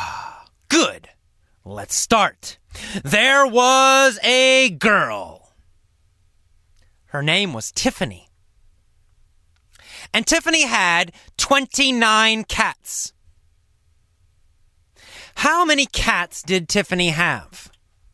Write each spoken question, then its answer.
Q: How many cats did Tiffany have?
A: She had 29 cats.